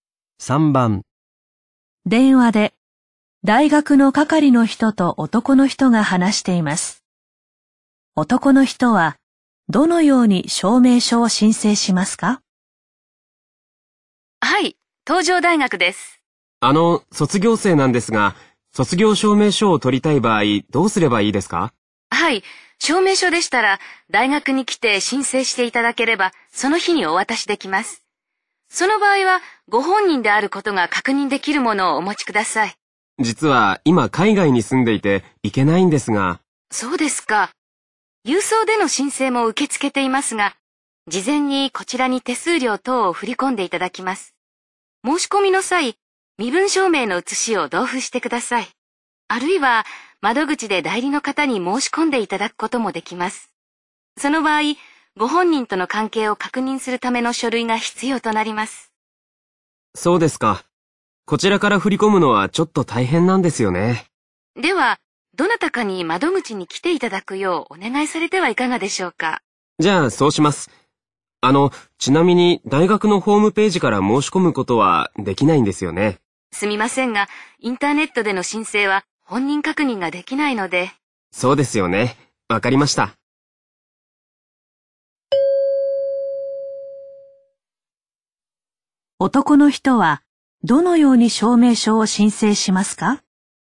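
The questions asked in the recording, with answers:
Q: 男の人はどのように証明書を申請しますか?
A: 代理の人に窓口で申し込んでもらう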